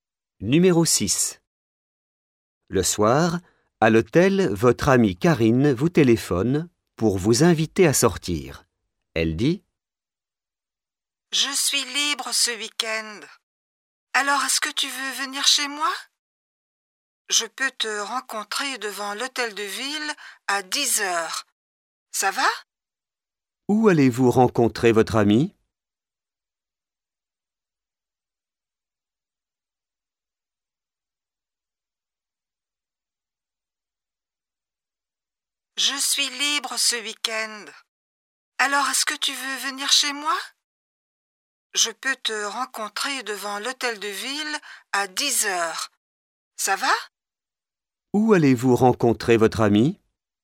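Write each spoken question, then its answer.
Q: Où allez-vous rencontrer votre ami?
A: Devant l'hôtel de ville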